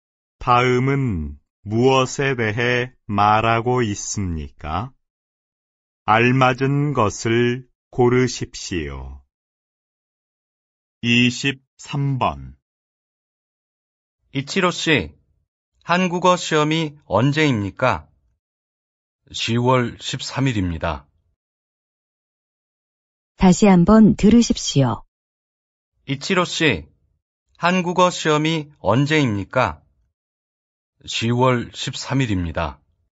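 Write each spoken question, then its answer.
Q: 다음은 무엇에 대해 말하고 있습니까?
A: 날짜(시험 날짜)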